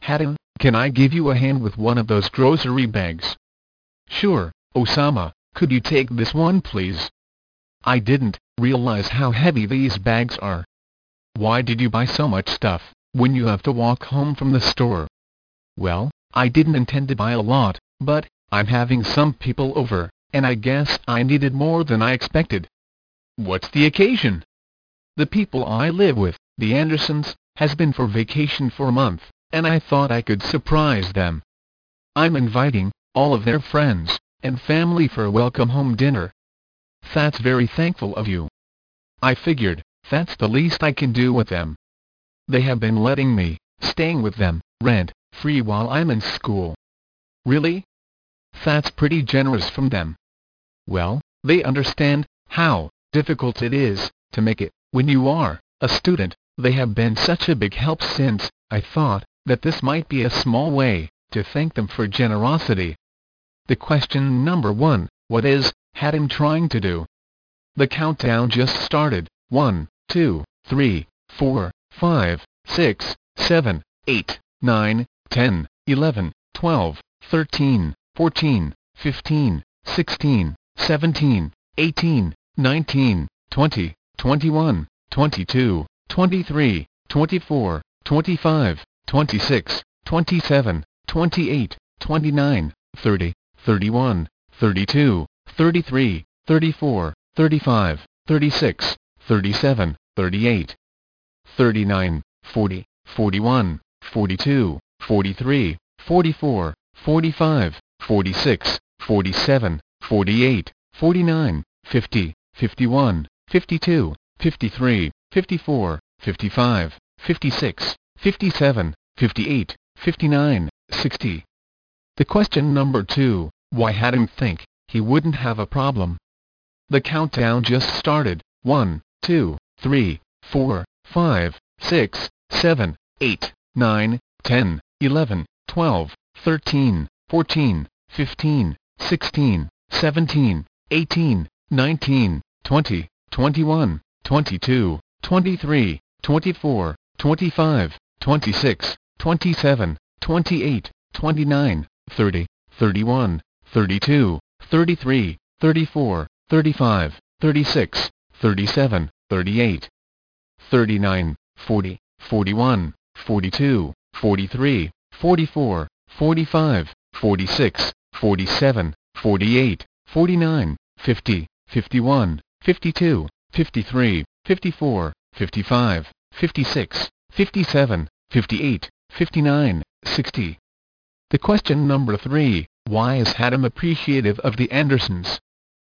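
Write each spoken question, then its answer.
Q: what is Hatim trying to do?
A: Surprise the Andersons with a welcome home dinner

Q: why is Hatim appreciative of the Andersons?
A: They let him stay with them rent-free while he's in school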